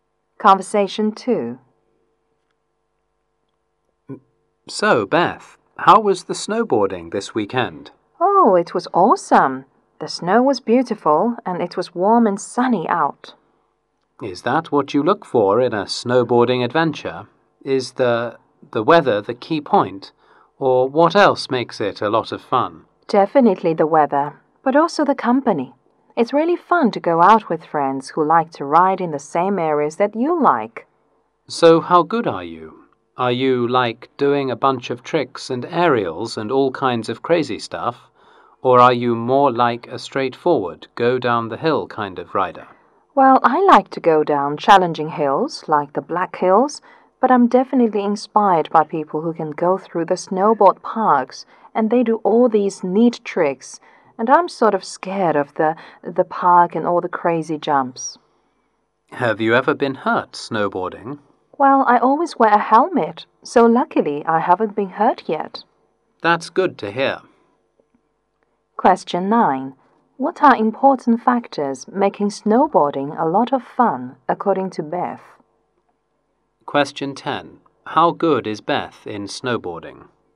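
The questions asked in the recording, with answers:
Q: What are important factors making snowboarding a lot of fun, according to Beth?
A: The weather and the company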